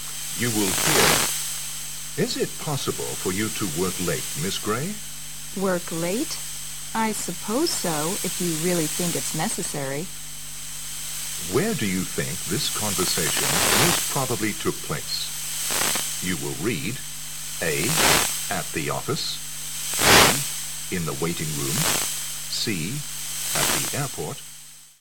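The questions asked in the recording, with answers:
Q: Where do you think this conversation most probably took place?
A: A: At the office.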